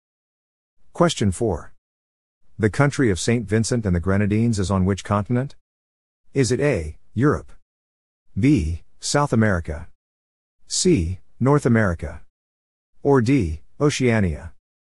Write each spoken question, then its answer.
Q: The country of St. Vincent and the Grenadines is on which continent?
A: The answer is C, North America.